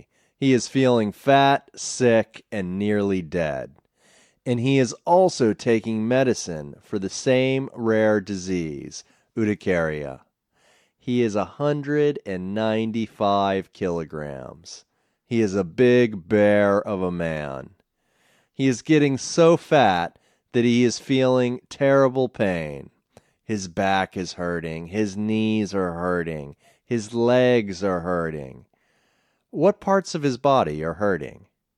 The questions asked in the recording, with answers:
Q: What parts of his body are hurting?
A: His back, knees, and legs are hurting.